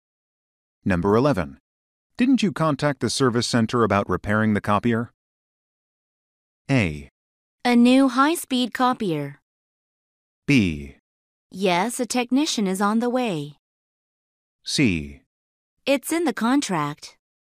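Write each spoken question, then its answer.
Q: Didn't you contact the service center about repairing the copier?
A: B: Yes, a technician is on the way.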